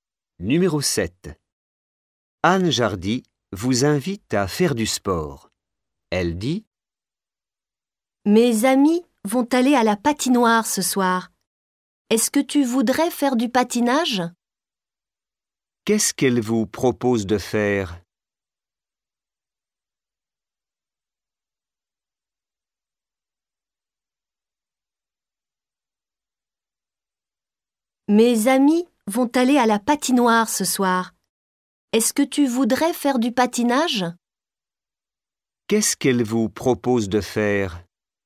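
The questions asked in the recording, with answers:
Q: Qu'est-ce qu'elle vous propose de faire ?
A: Du patinage (à la patinoire)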